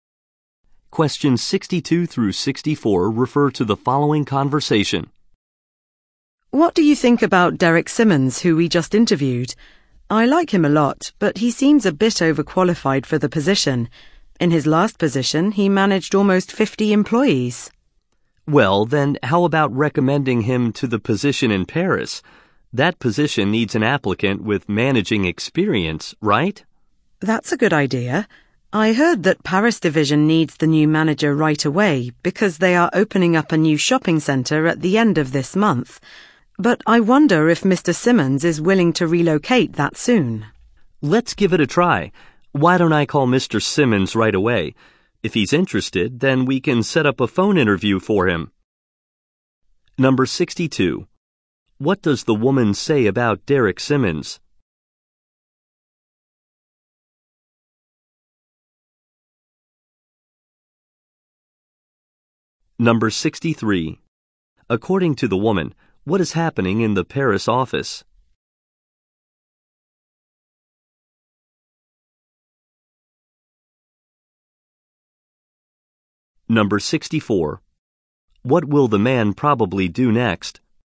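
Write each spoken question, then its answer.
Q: What does the woman say about Derek Simmons?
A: He seems overqualified.

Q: What will the man probably do next?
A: Call Mr. Simmons.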